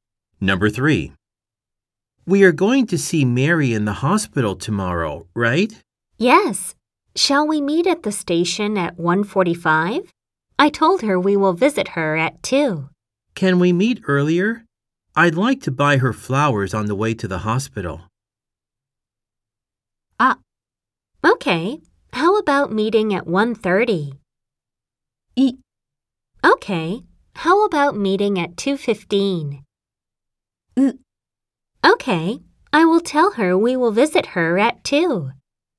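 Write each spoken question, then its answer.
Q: Can we meet earlier? I'd like to buy her flowers on the way to the hospital.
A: A: How about meeting at 1:30?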